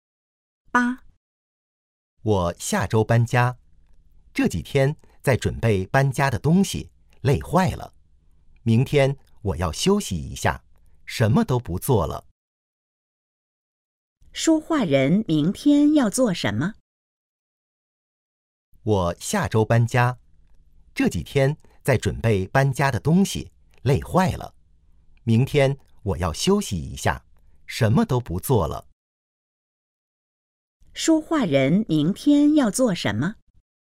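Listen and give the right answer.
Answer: 休息,什么都不做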